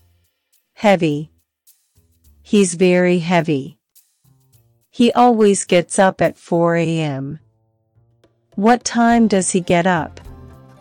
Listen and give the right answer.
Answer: 4 a.m. He gets up at 4 a.m.